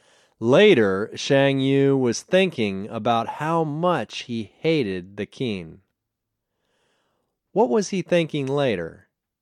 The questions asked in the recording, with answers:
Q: What was he thinking later?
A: Later, he was thinking about how much he hated the Qin.